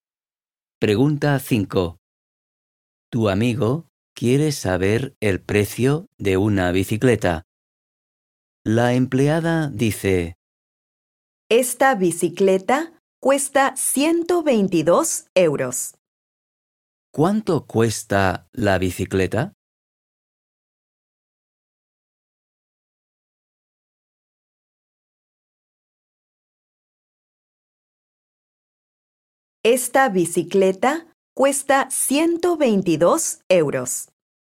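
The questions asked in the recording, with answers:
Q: ¿Cuánto cuesta la bicicleta?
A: 122 euros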